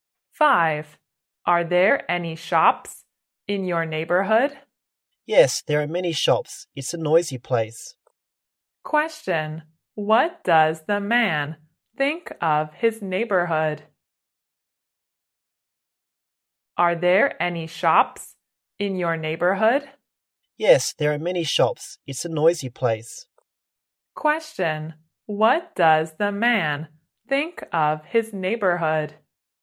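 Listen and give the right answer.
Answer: It's noisy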